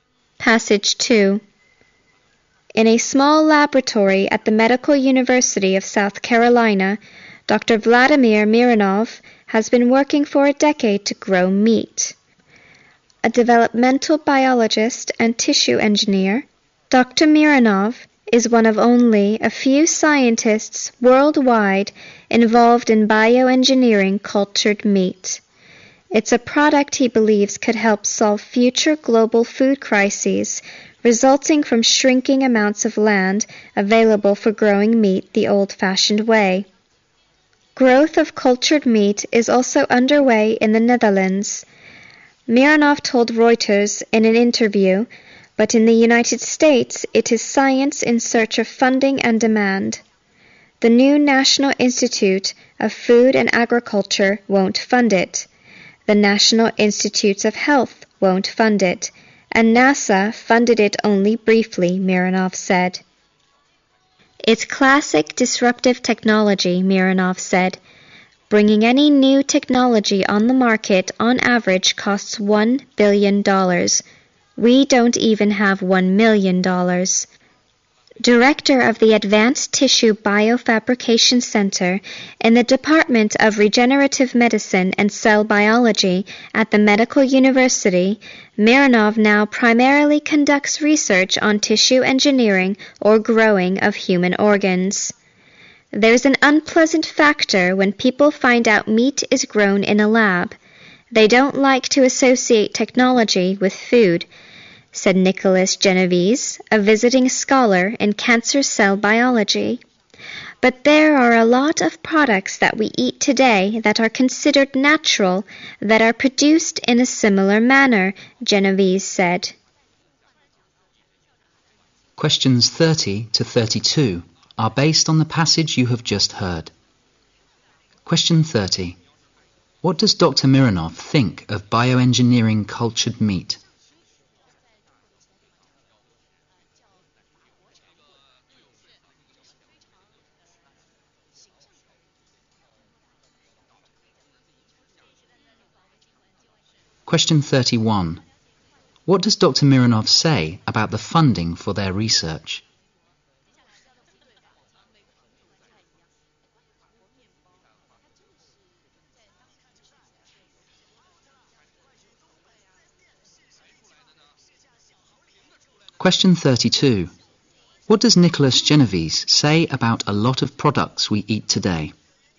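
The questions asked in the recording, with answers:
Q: Mironov think of bioengineering cultured meat?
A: It could help solve future global food crises

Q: Mironov say about the funding for their research?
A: They can't get enough funding

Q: What does Nicholas Genovese say about a lot of products we eat today?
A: They are considered natural but are produced in a similar manner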